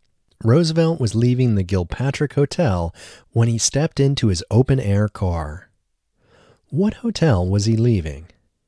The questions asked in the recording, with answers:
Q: What hotel was he leaving?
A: He was leaving the Gilpatrick Hotel.